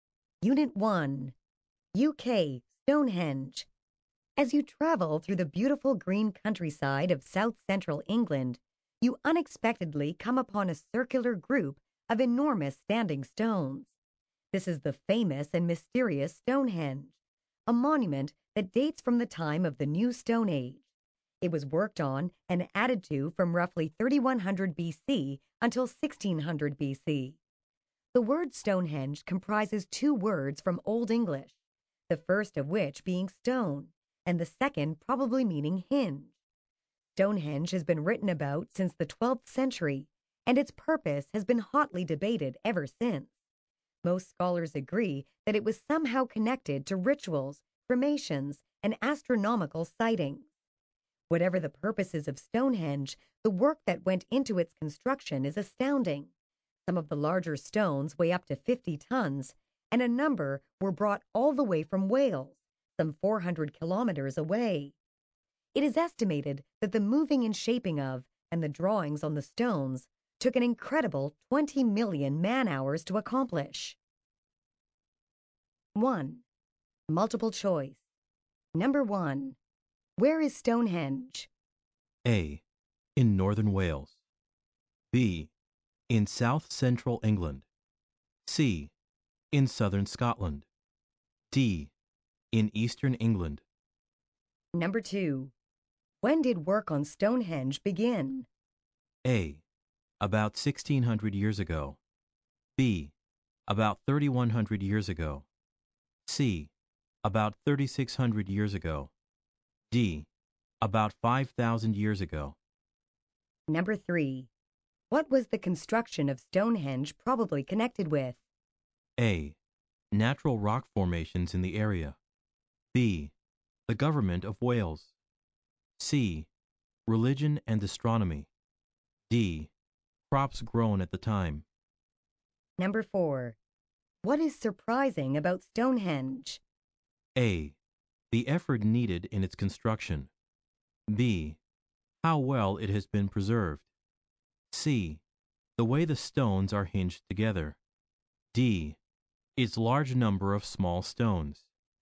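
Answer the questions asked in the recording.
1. B: In south-central England.
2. D: About 5000 years ago.
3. C: Religion and astronomy.
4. A: The effort needed in its construction.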